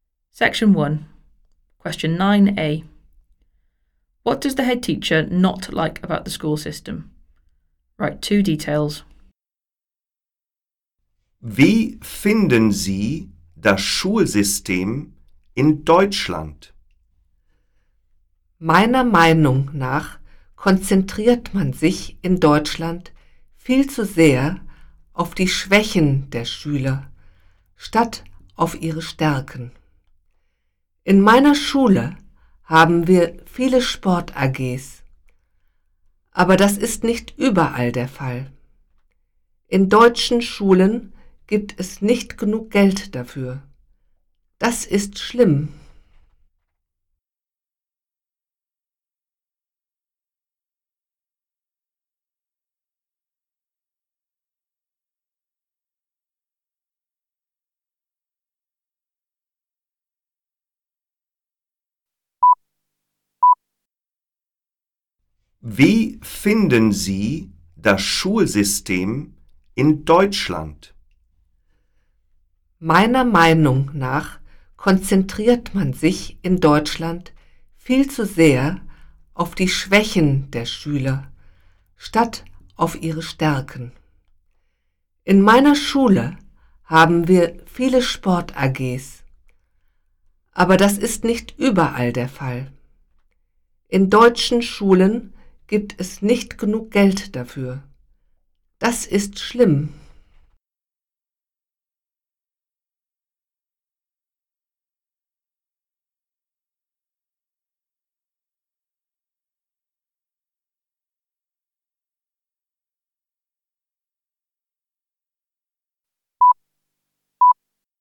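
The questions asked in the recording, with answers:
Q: What does the head teacher not like about the school system?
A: Focus on pupils' weaknesses rather than strengths; not enough money for sports clubs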